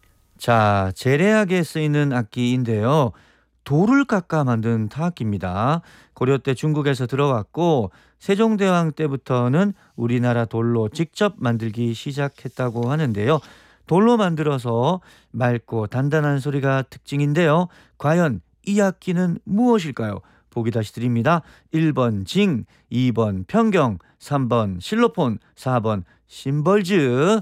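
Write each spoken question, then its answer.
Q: 과연 이 악기는 무엇일까요?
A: 2: 평경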